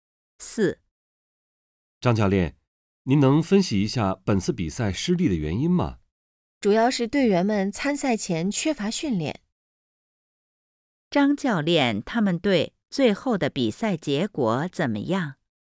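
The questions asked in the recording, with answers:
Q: 张教练,他们队最后的比赛结果怎么样?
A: 比赛失利了(输了)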